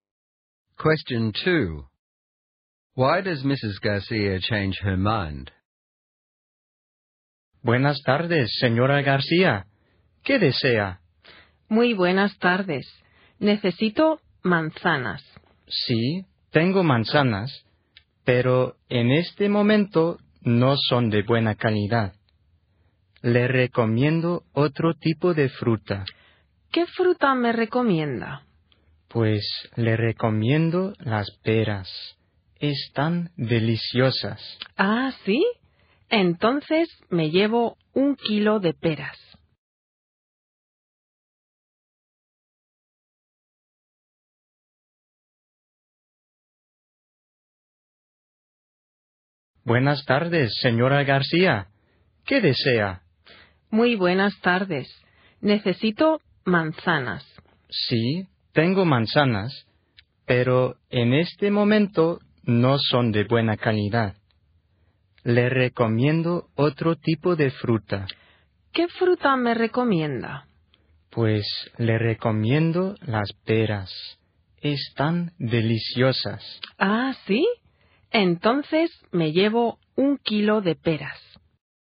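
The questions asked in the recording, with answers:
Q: Why does Mrs. Garcia change her mind?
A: The apples aren't good quality right now, and the seller recommends the pears, which are delicious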